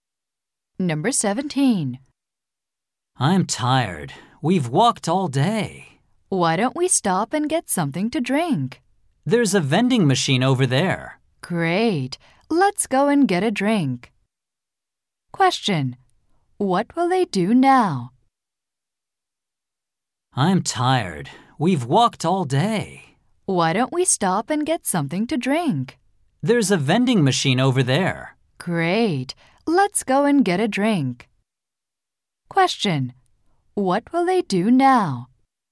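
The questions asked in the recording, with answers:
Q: What will they do now?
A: Get a drink from a vending machine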